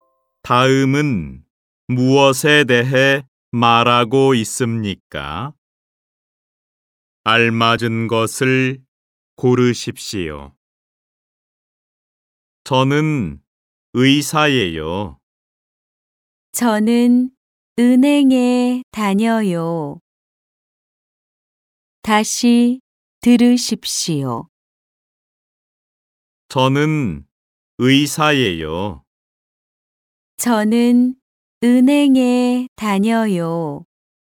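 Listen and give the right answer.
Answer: 직업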